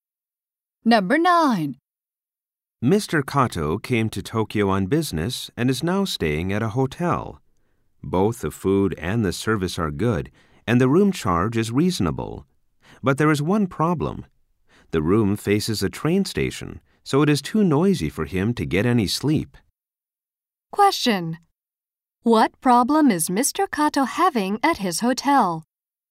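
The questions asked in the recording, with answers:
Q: What problem is Mr.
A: His room is too noisy to sleep because it faces a train station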